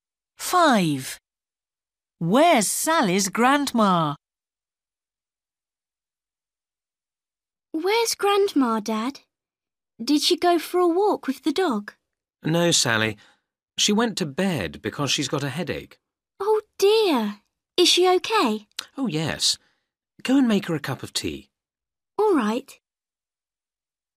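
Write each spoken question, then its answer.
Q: Where's Sally's grandma?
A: In bed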